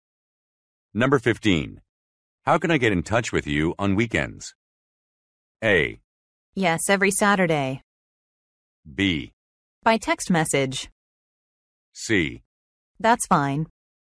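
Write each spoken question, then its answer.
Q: How can I get in touch with you on weekends?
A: B: By text message.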